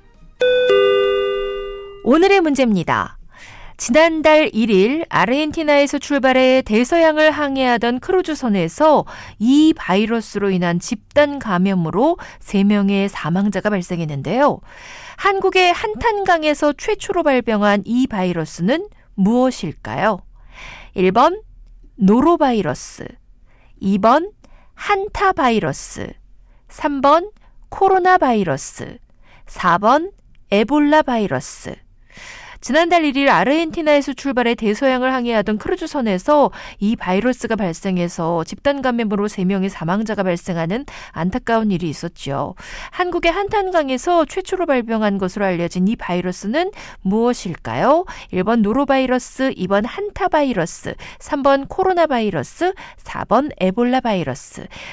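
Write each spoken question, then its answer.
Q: 한국의 한탄강에서 최초로 발병한 것으로 알려진 이 바이러스는 무엇일까요?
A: 2번: 한타바이러스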